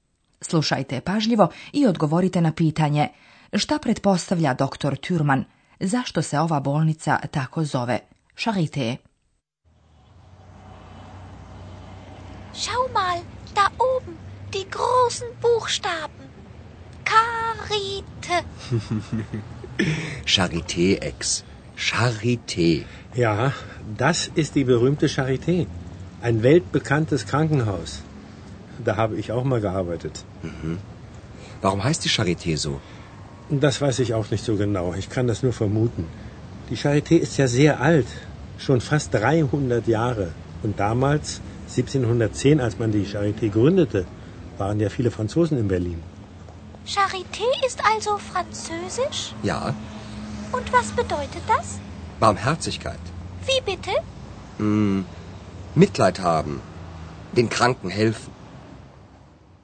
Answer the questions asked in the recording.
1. Zato je, kako se pretpostavlja, i dobila francusko ime.
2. Charité je francuska riječ.